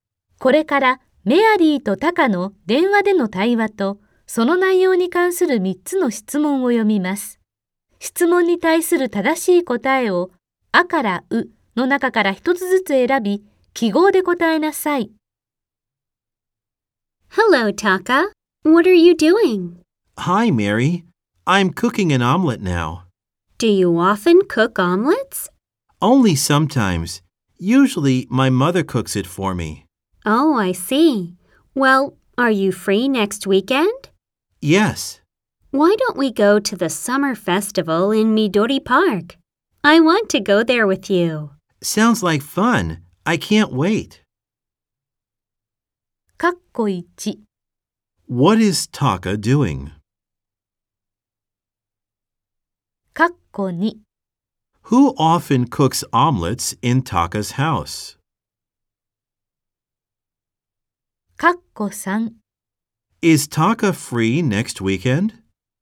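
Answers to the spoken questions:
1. He is cooking an omelette.
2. His mother.
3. Yes, he is.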